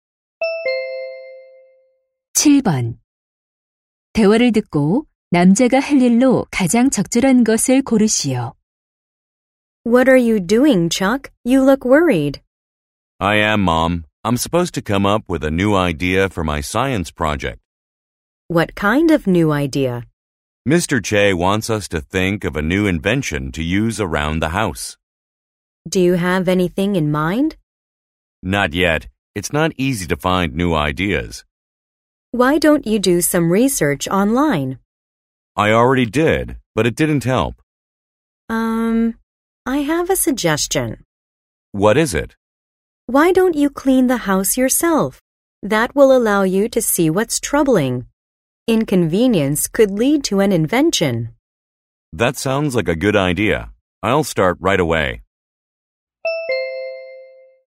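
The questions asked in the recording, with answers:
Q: 대화를 듣고 남자가 할 일로 가장 적절한 것을 고르시오.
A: 직접 집 청소하기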